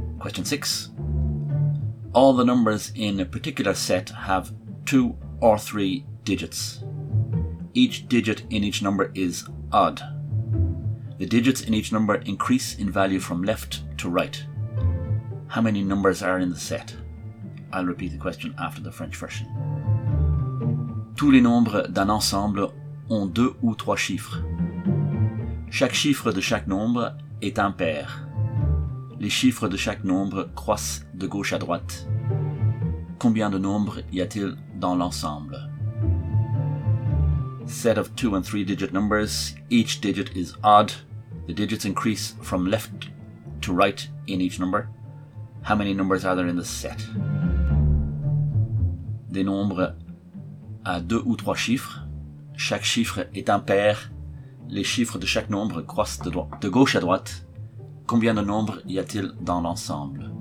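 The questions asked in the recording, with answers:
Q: How many numbers are in the set?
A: 20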